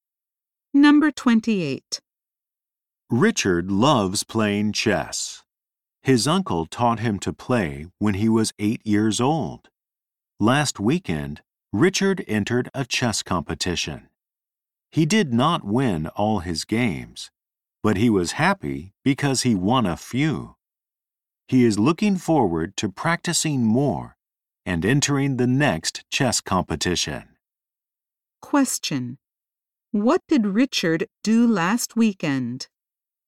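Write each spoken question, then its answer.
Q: What did Richard do last weekend?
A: He entered a chess competition.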